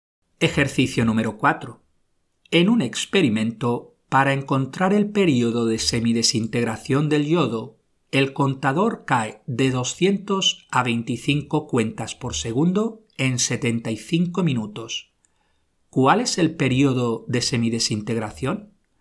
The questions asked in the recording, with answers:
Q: ¿Cuál es el periodo de semidesintegración?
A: 75 minutos dividido 3 igual 25 minutos.